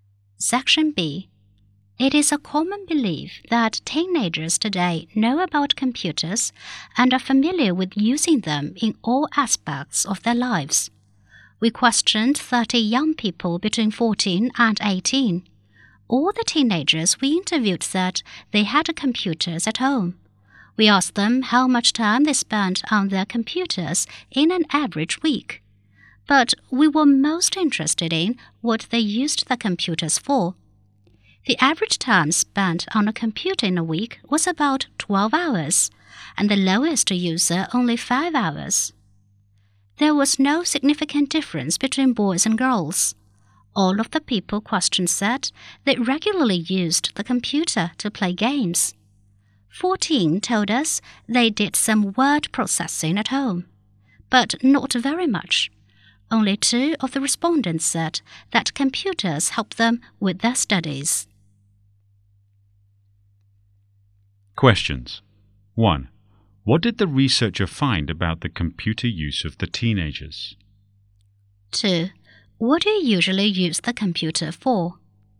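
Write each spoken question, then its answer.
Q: What did the researcher find about the computer use of the teenagers?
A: They used computers about 12 hours a week on average, mostly to play games; few used them for word processing or study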